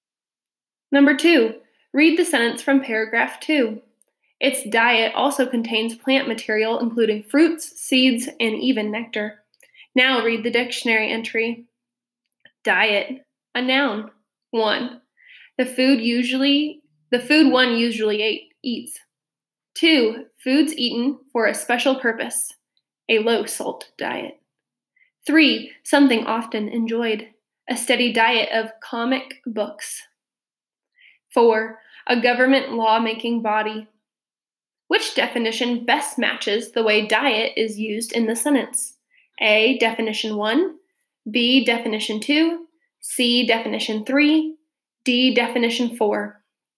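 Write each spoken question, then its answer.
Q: Which definition best matches the way diet is used in the sentence?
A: A: definition 1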